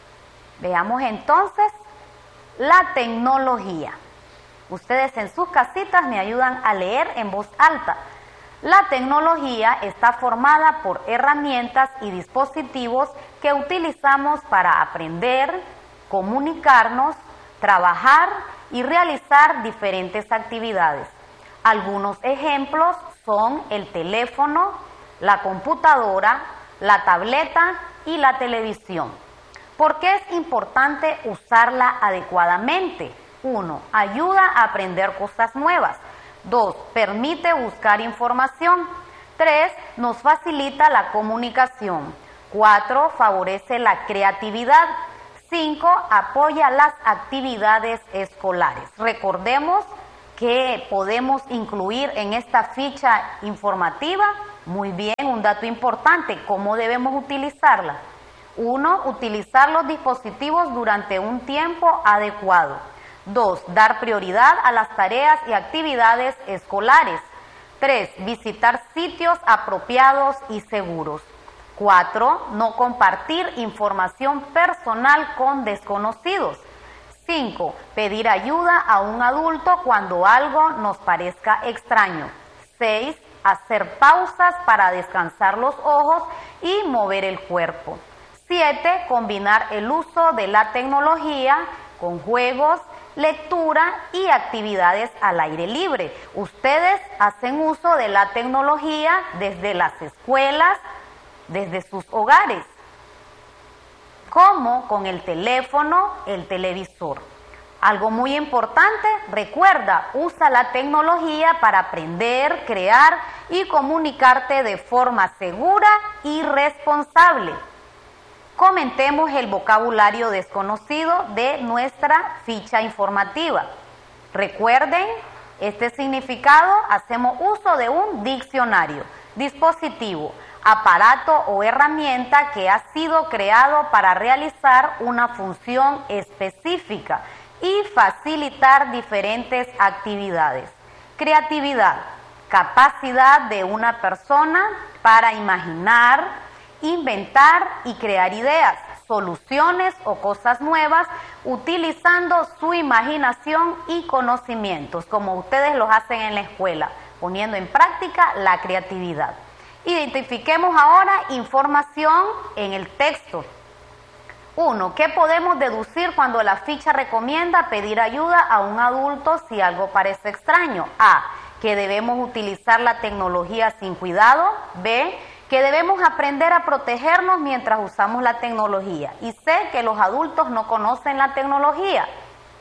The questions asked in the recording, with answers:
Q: ¿Qué podemos deducir cuando la ficha recomienda pedir ayuda a un adulto si algo parece extraño?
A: Muy bien, B, que debemos aprender a protegernos mientras usamos la tecnología.